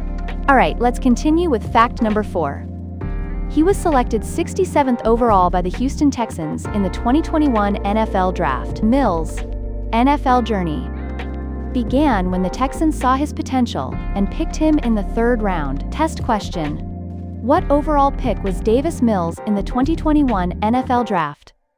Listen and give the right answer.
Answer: 67th.